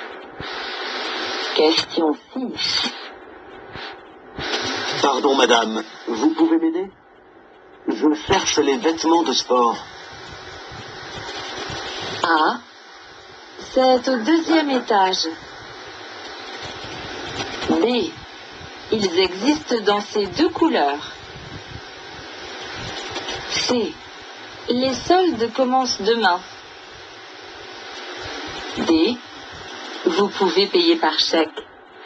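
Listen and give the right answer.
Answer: A: c'est au deuxième étage.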